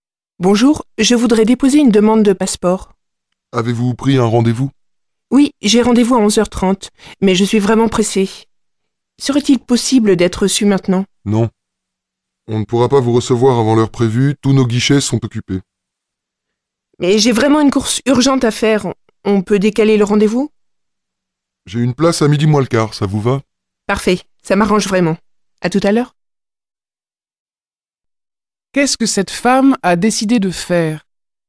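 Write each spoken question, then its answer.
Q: Qu'est-ce que cette femme a décidé de faire?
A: Décaler son rendez-vous à midi moins le quart (11h45)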